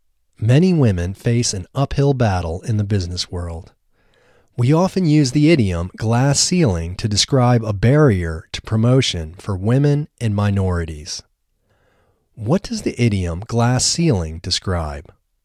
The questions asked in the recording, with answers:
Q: What does the idiom glass ceiling describe?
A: The idiom glass ceiling describes a barrier to promotion for women and minorities.